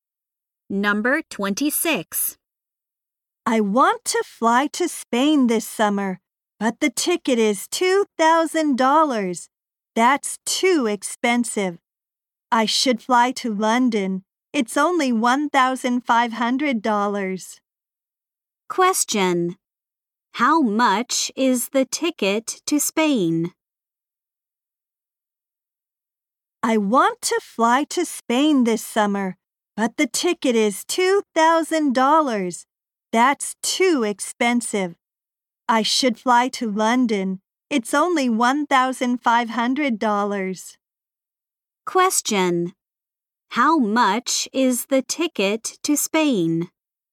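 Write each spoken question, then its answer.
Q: How much is the ticket to Spain?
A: $2,000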